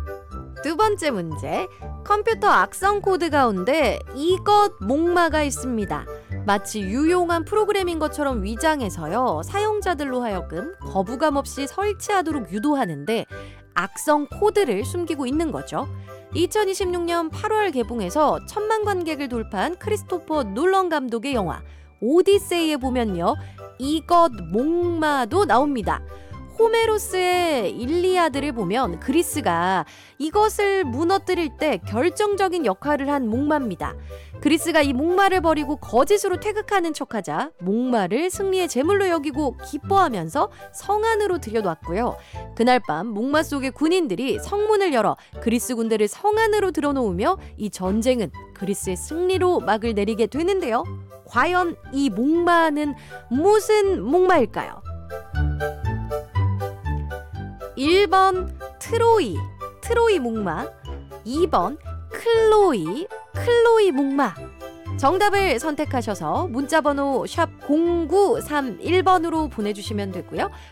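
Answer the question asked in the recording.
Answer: 1: 트로이 목마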